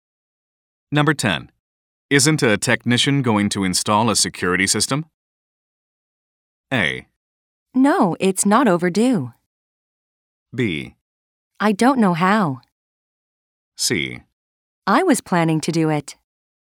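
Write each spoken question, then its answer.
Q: Isn't a technician going to install a security system?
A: C: I was planning to do it.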